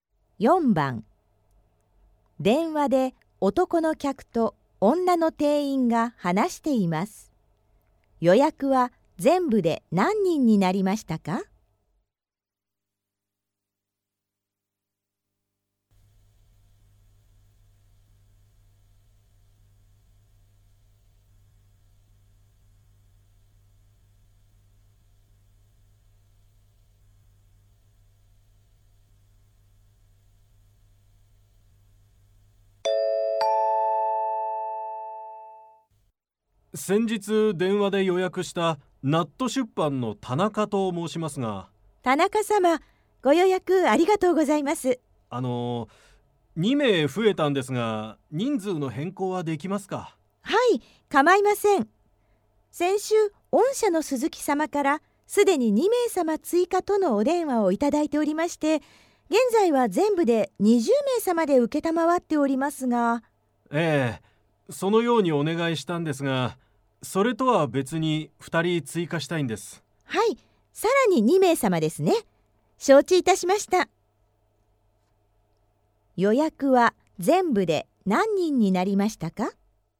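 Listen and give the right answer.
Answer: 22人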